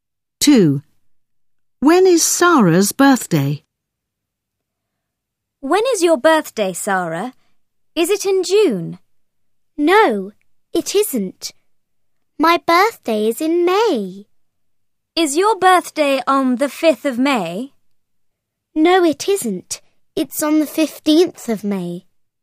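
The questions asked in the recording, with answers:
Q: When is Sarah's birthday?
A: On the 15th of May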